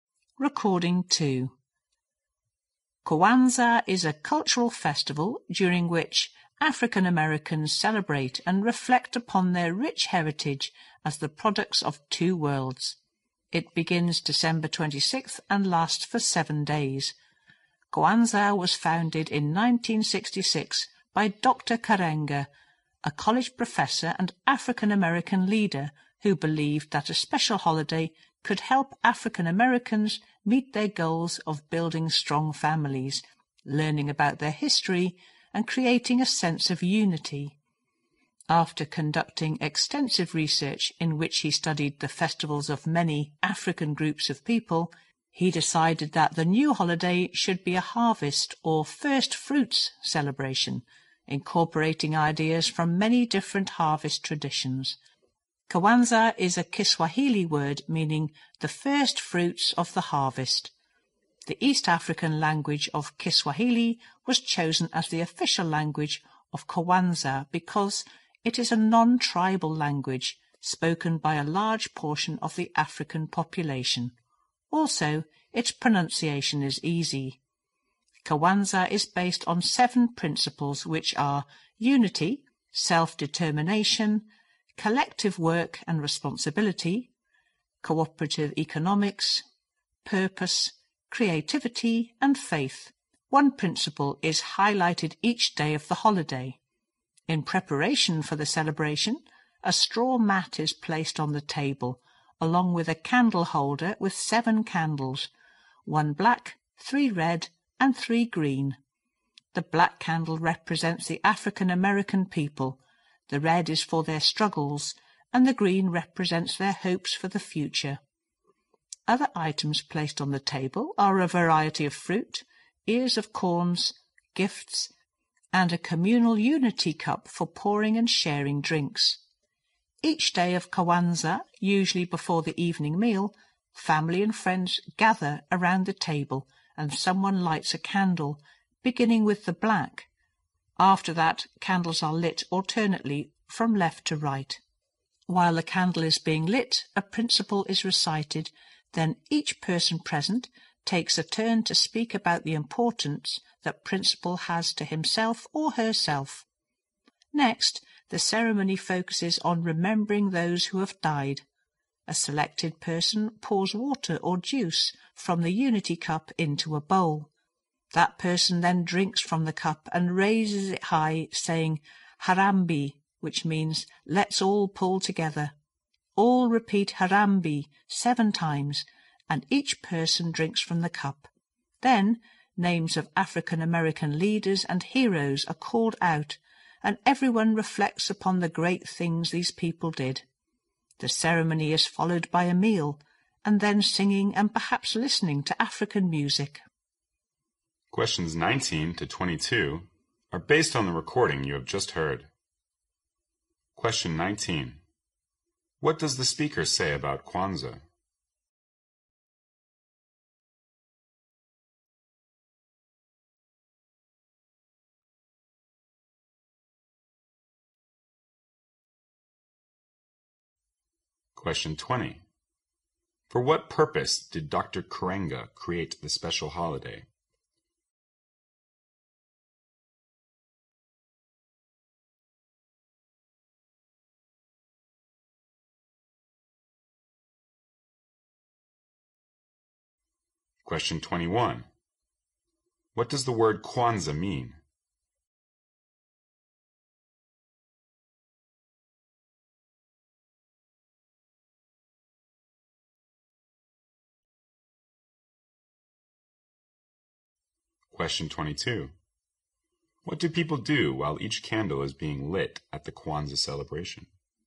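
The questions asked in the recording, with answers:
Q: For what purpose did Dr. Karenga create the special holiday?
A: To help African Americans build strong families, learn their history and create unity

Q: What does the word Kwanzaa mean?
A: The first fruits of the harvest

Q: What do people do while each candle is being lit at the Kwanzaa celebration?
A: They recite a principle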